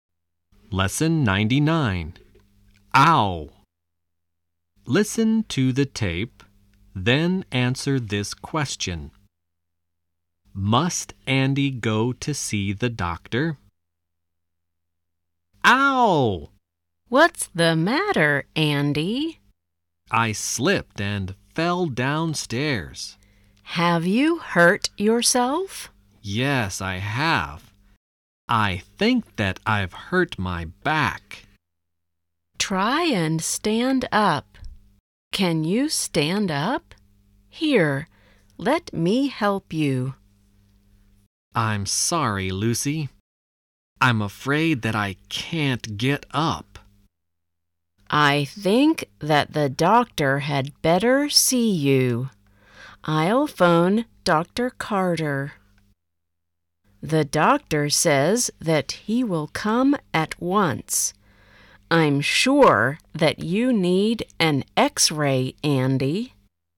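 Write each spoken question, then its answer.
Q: Must Andy go to see the doctor?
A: No, the doctor will come to see him at once.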